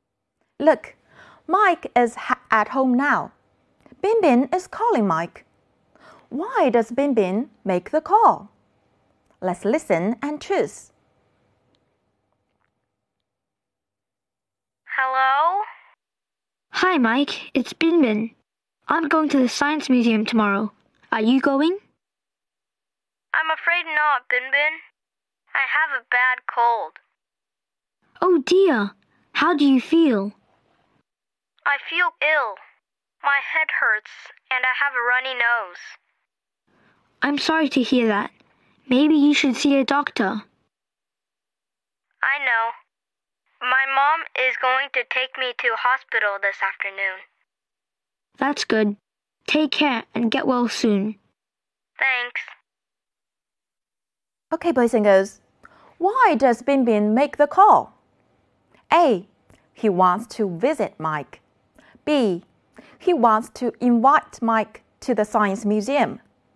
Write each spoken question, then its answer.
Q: Why does Bin Bin make the call?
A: Right, we choose B.